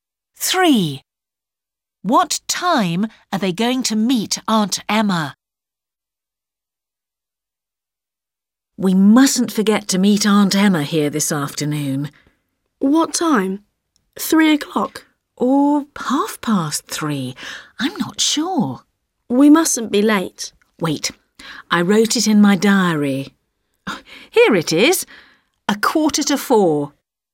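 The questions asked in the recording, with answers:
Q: What time are they going to meet Aunt Emma?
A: 4:15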